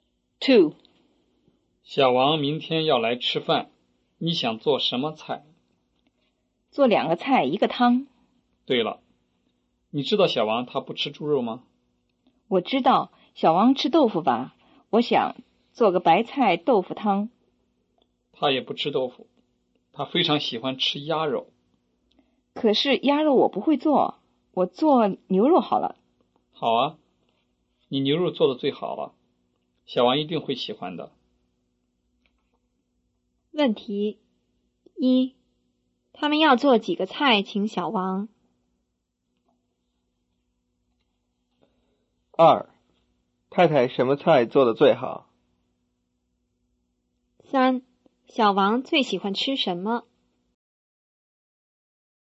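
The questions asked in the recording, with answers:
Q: 问题一,他们要做几个菜请小王?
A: 两个菜一个汤

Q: 二,太太什么菜做的最好?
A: 牛肉

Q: 三,小王最喜欢吃什么?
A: 鸭肉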